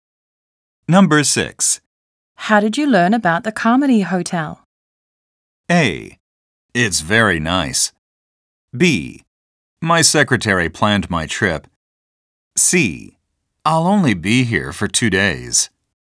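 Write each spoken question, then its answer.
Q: How did you learn about the Carmody Hotel?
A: B: My secretary planned my trip.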